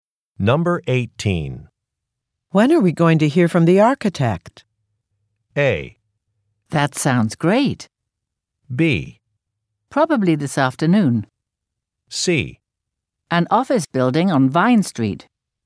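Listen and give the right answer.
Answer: B: Probably this afternoon.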